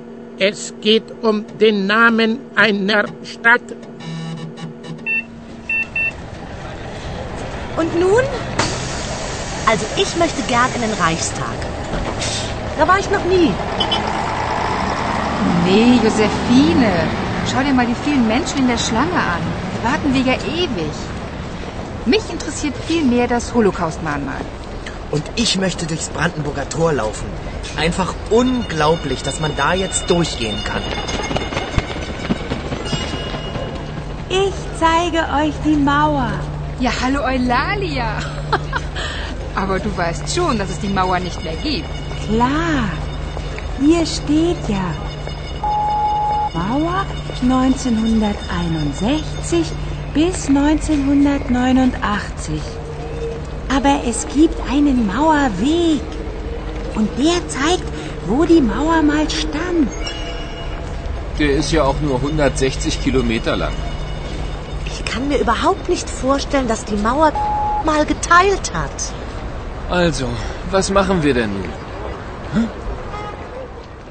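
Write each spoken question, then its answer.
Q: Es geht um den Namen einer Stadt.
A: Berlin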